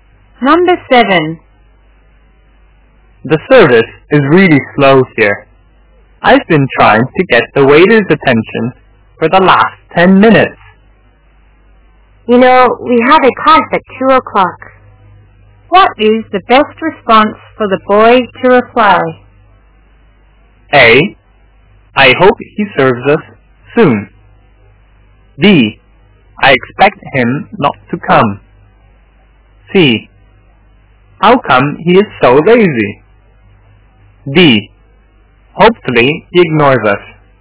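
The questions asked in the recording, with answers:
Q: What is the best response for the boy to reply?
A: A: I hope he serves us soon.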